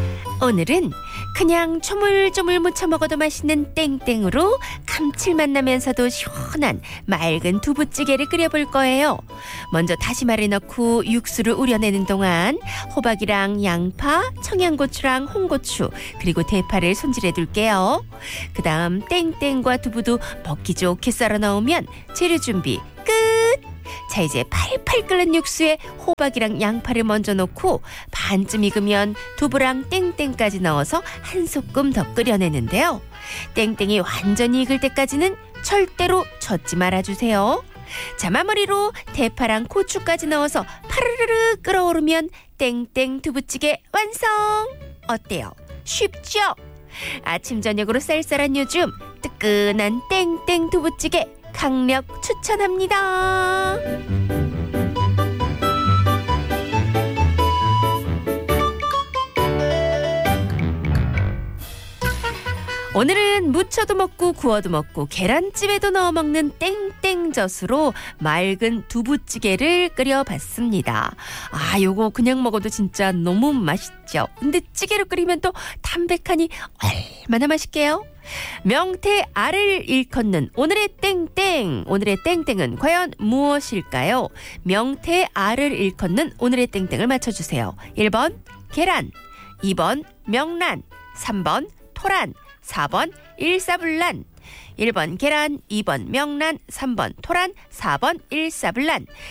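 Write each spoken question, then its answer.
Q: 명태 알을 일컫는 오늘의 땡땡을 맞춰주세요. 1번 계란, 2번 명란, 3번 토란, 4번 일사불란.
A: 2: 명란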